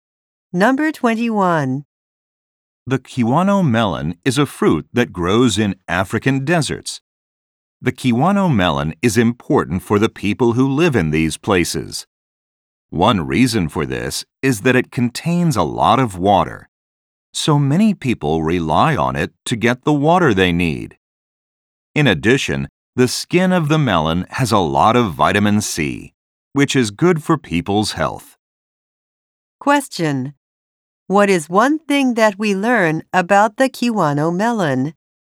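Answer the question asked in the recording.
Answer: It contains a lot of water.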